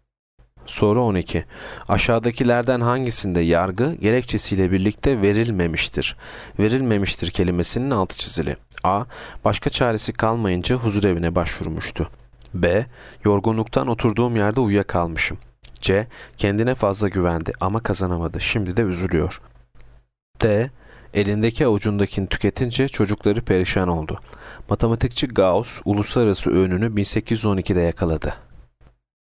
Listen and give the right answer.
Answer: Yanıt E. Matematikçi Gauss uluslararası ünlünü 1812'de yakaladı.